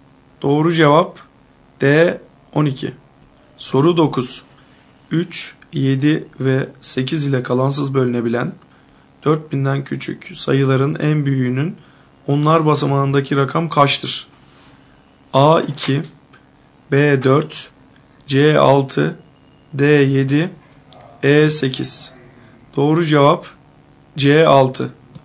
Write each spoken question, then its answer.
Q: 3, 7 ve 8 ile kalansız bölünebilen 4000'den küçük sayıların en büyüğünün onlar basamağındaki rakam kaçtır?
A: Doğru cevap C 6.